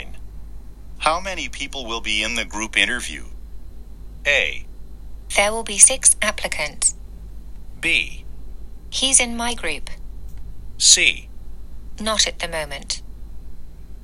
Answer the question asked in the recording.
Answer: ということで今日の正答はこれですね。